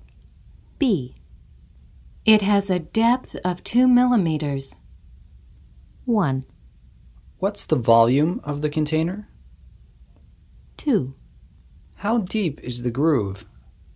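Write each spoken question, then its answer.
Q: It has a depth of 2 millimeters.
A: 2: How deep is the groove?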